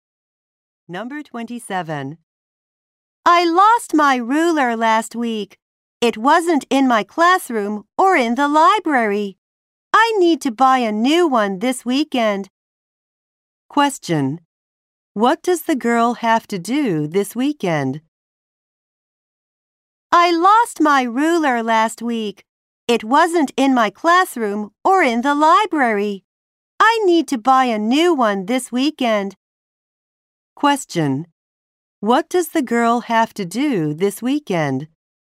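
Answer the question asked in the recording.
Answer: Buy a new ruler.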